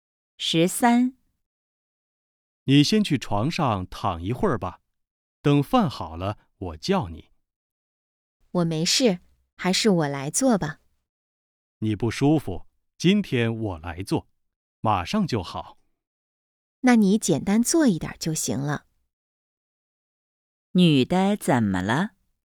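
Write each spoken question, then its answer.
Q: 女的怎么了?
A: 不舒服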